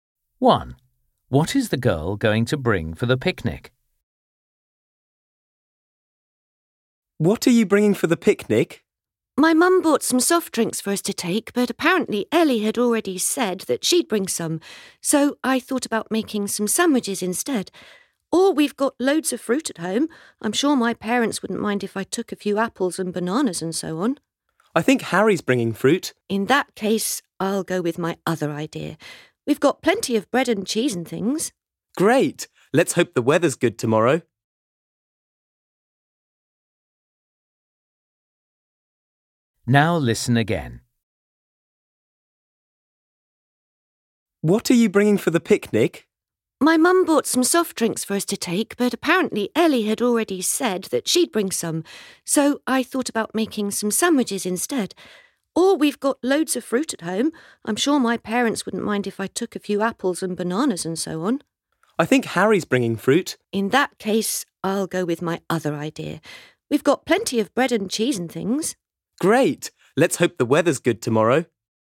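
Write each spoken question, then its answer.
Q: What is the girl going to bring for the picnic?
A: sandwiches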